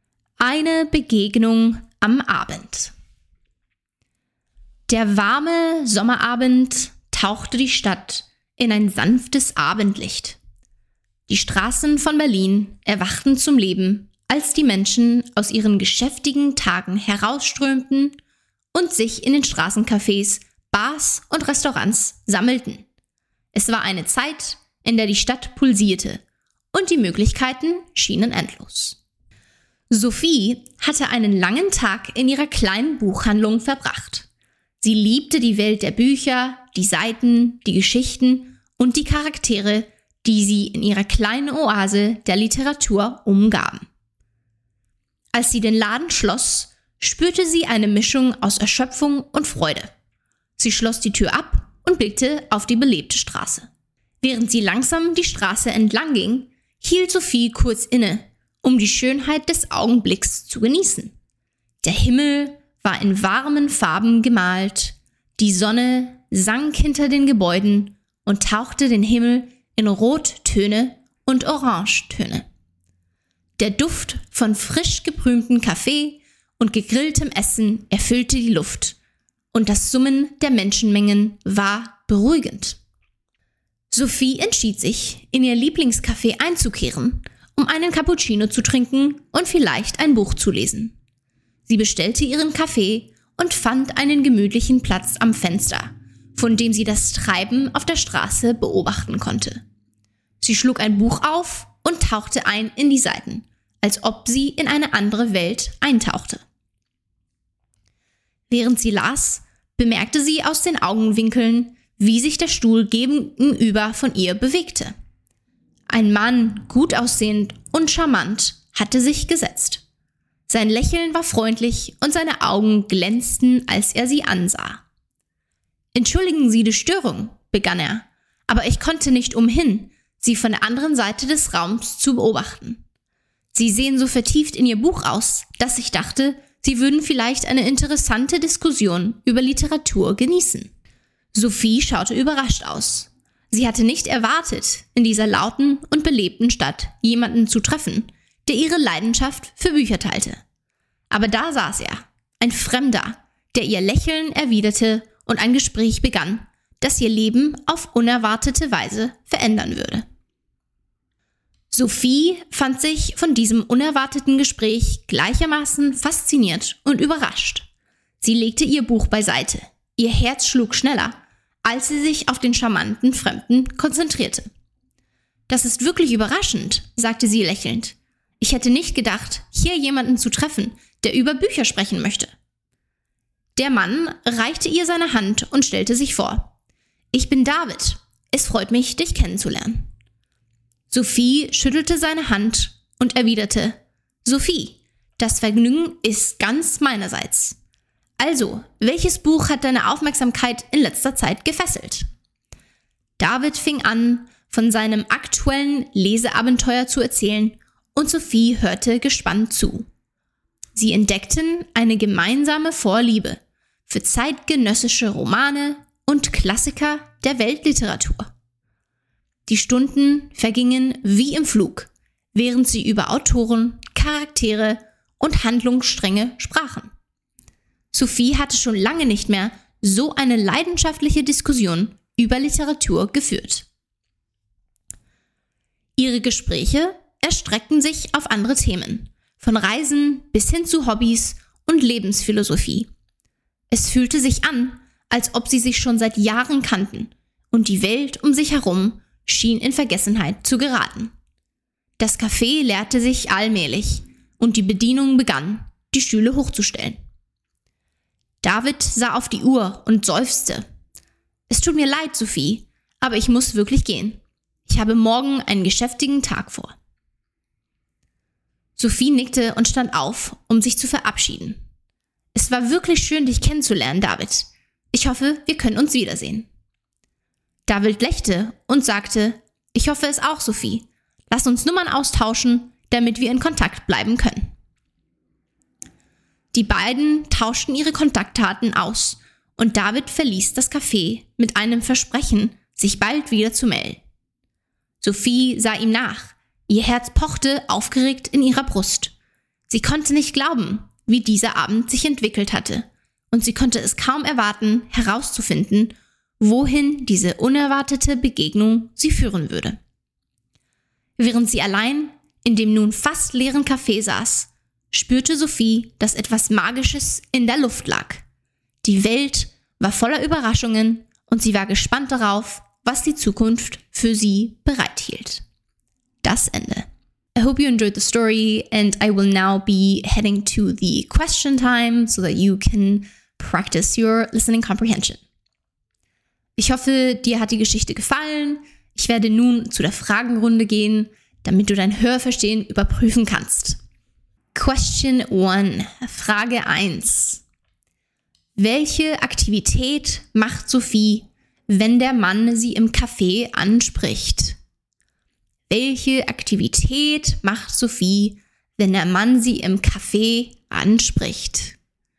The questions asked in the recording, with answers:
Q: Welche Aktivität macht Sophie, wenn der Mann sie im Café anspricht?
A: Sie liest ein Buch. Sophie liest ihr Buch in dem Café.